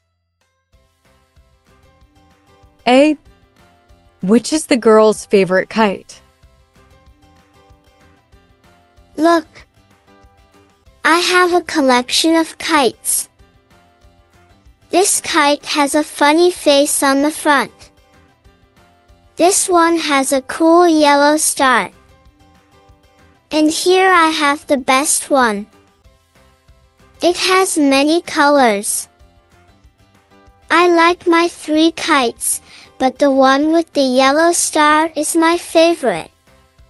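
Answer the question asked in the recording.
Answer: The one with the yellow star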